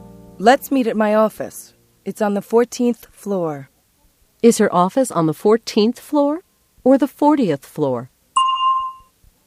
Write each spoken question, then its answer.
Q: Is her office on the 14th floor or the 40th floor?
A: It's on the 14th floor. 14.